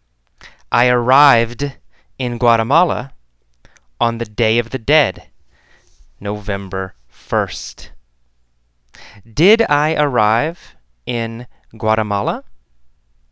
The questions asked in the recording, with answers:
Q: Did I arrive in Guatemala?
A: Yes, I arrived in Guatemala.